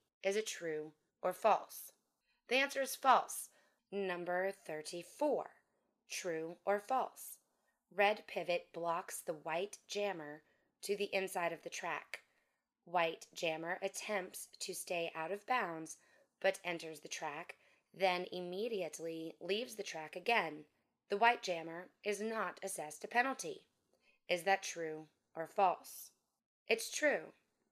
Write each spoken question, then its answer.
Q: The white jammer is not assessed a penalty.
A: It's true.